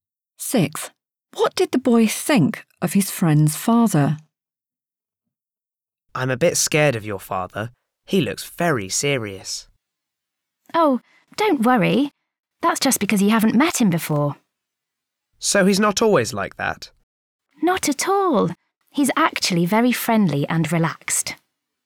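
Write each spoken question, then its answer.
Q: What did the boy think of his friend's father?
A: He looked very serious (the boy was a bit scared of him)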